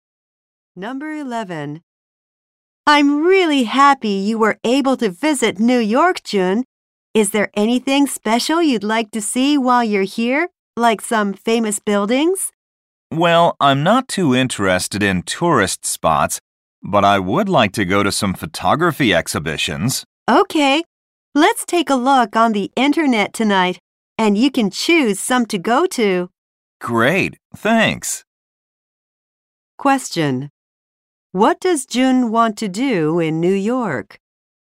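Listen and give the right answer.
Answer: Go to photography exhibitions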